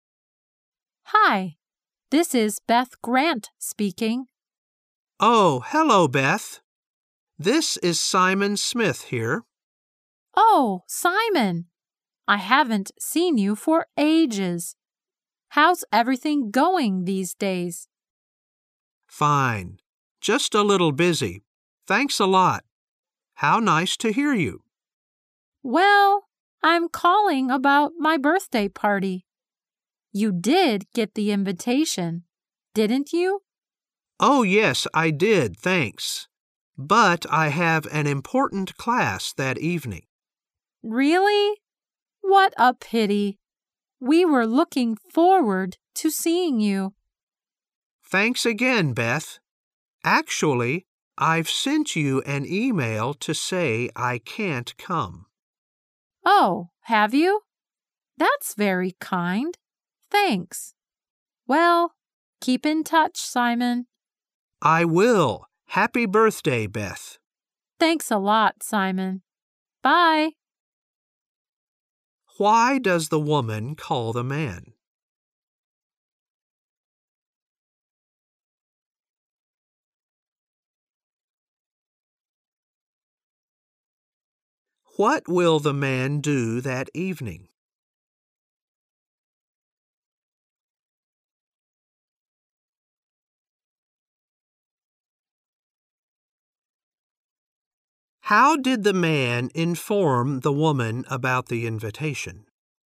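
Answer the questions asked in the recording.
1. To talk about her birthday party
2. Attend an important class
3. By email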